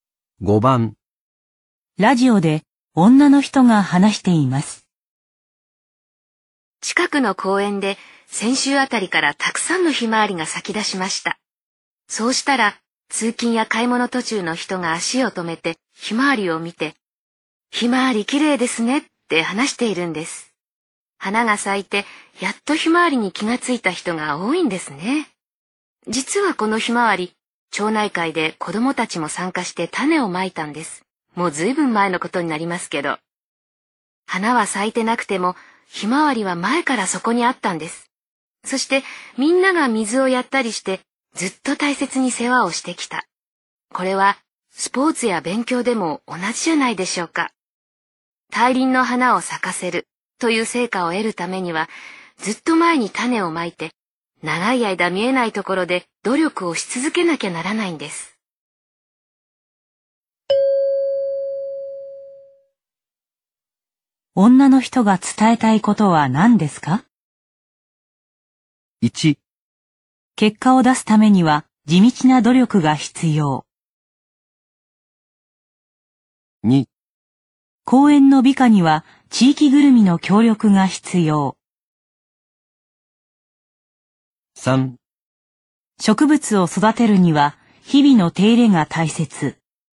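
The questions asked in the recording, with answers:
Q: 女の人が伝えたいことは何ですか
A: 1: 結果を出すためには地道な努力が必要。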